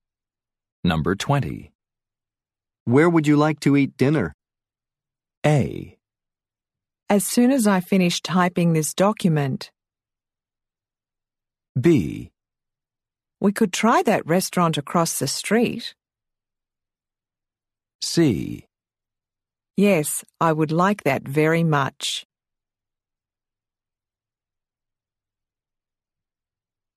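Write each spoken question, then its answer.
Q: Where would you like to eat dinner?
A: B: We could try that restaurant across the street.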